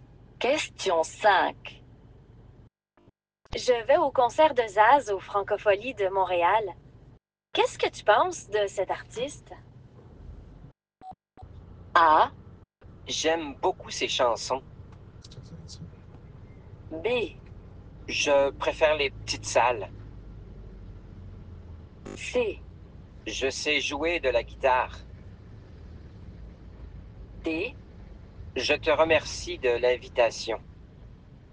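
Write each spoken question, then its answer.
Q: Qu'est-ce que tu penses de cet artiste?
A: A: J'aime beaucoup ses chansons.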